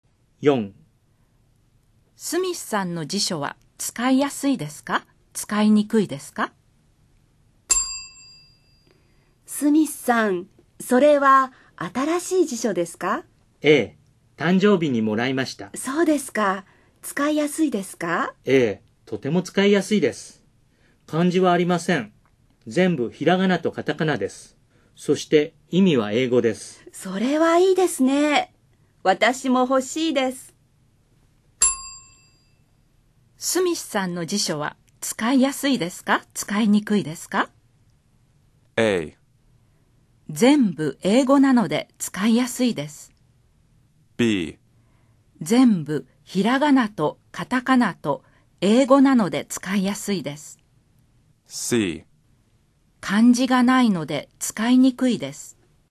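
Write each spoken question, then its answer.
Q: スミスさんの辞書は使いやすいですか?使いにくいですか?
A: B: 全部ひらがなとカタカナと英語なので使いやすいです。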